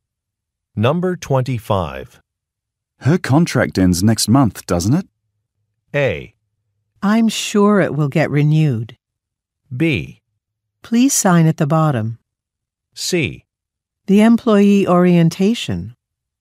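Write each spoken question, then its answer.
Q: Her contract ends next month, doesn't it?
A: A: I'm sure it will get renewed.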